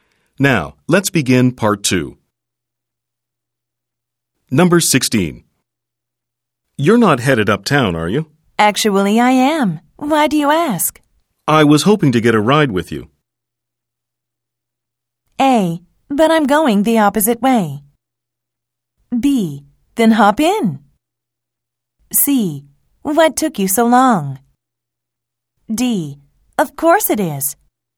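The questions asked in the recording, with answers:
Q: You're not headed uptown, are you? Actually, I am. Why do you ask? I was hoping to get a ride with you.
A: B: Then hop in.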